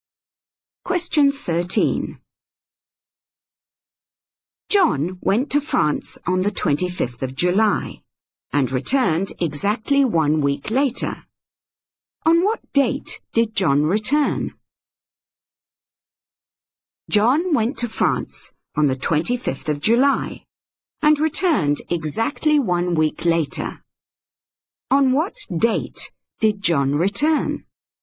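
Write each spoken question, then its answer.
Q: On what date did John return?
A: 1st of August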